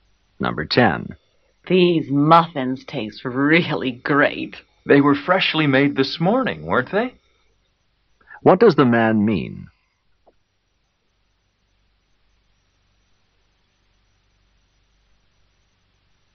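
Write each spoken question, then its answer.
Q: What does the man mean?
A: He thinks the muffins were freshly made this morning.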